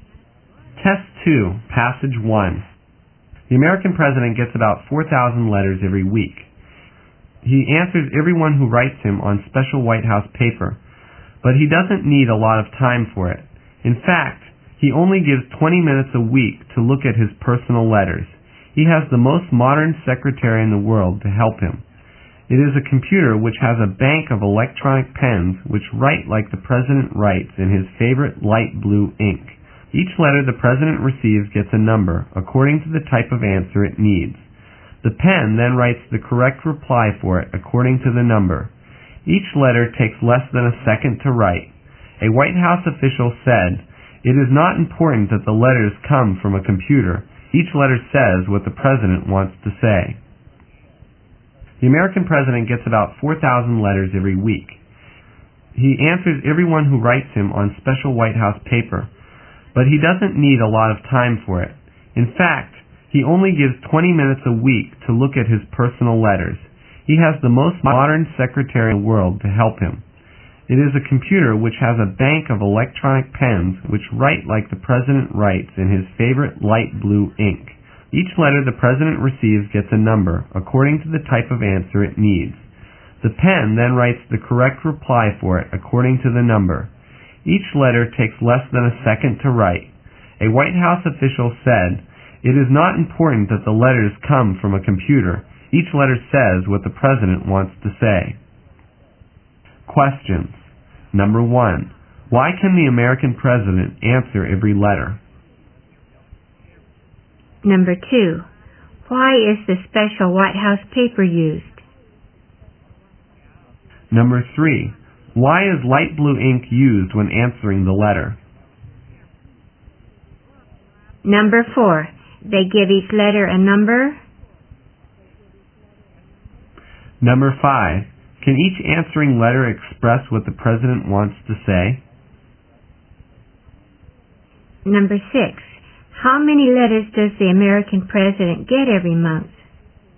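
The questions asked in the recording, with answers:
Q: Why can the American president answer every letter?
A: A computer helps him write the replies

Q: Can each answering letter express what the president wants to say?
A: Yes

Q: How many letters does the American president get every month?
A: About 16,000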